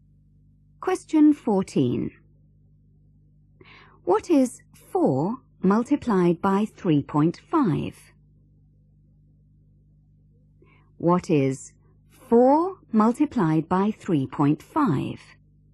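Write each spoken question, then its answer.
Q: What is 4 multiplied by 3.5?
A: 14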